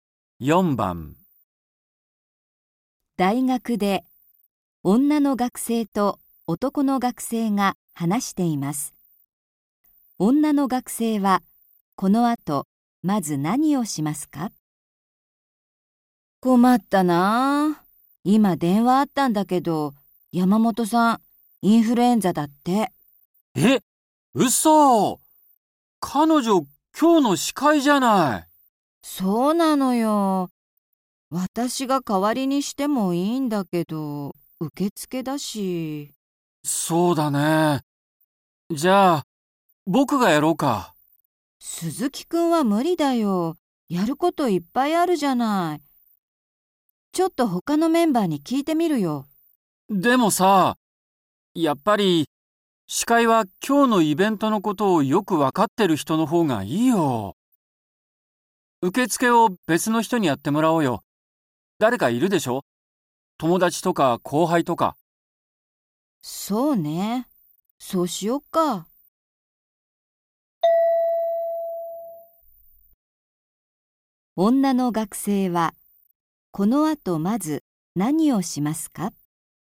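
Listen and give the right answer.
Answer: 受付を代わりにやってくれる人(友達や後輩)を探す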